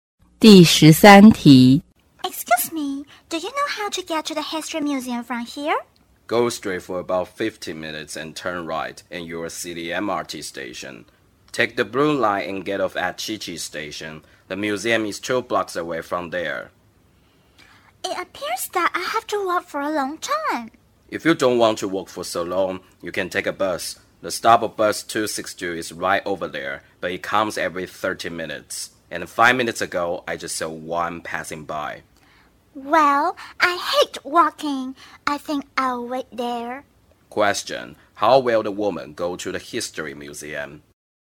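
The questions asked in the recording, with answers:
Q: Question, how will the woman go to the history museum?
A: By bus (bus 262)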